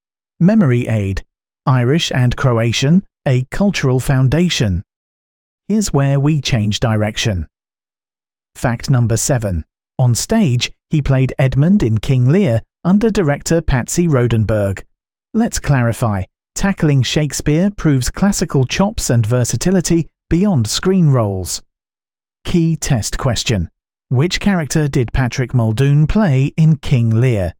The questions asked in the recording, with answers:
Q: Which character did Patrick Muldoon play in King Lear?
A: Correct answer. Edmund.